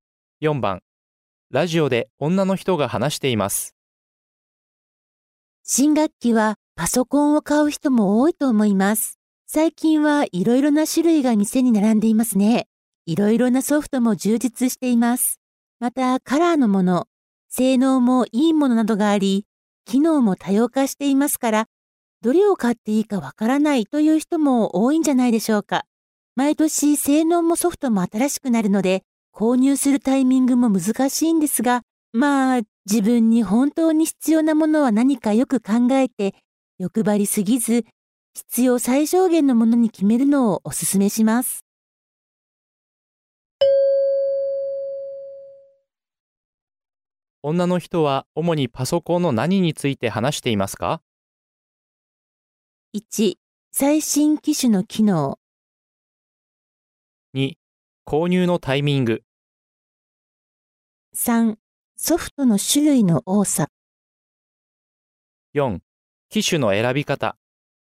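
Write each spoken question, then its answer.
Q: 女の人は主にパソコンの何について話していますか?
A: 4: 機種の選び方。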